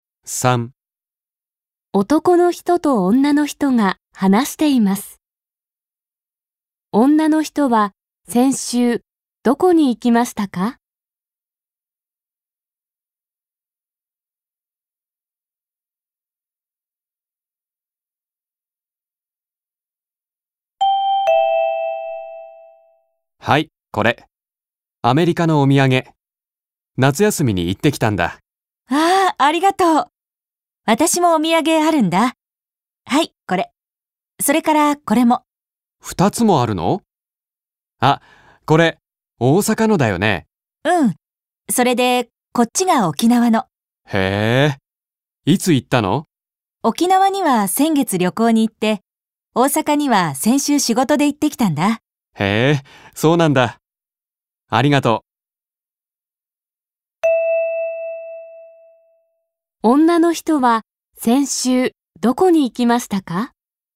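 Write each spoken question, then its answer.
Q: 女の人は先週どこに行きましたか?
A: 大阪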